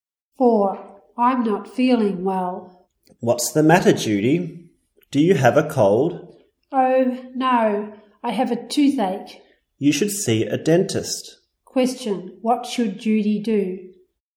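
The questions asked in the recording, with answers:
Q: What should Judy do?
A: See a dentist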